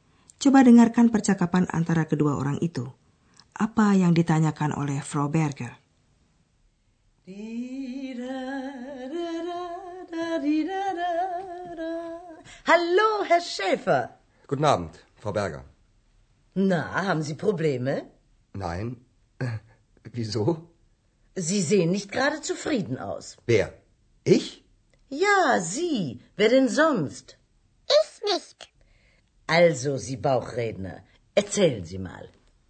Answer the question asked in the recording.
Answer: Frau Berger bertanya kepada Andreas apakah dia mempunyai masalah.